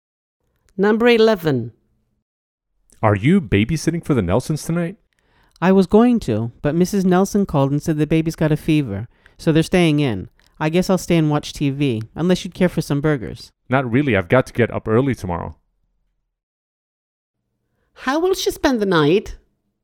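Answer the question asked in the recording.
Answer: Staying home watching TV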